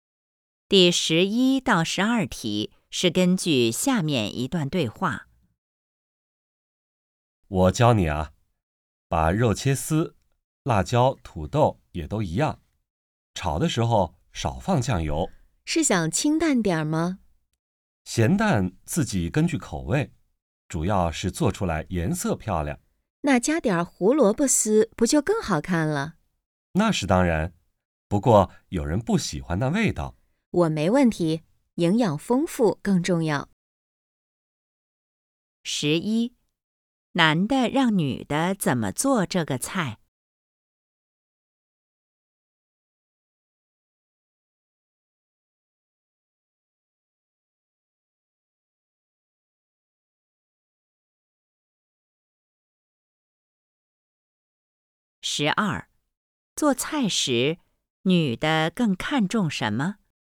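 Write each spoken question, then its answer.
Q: 男的让女的怎么做这个菜?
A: 把肉、辣椒、土豆切丝,炒时少放酱油

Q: 做菜时,女的更看重什么?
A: 营养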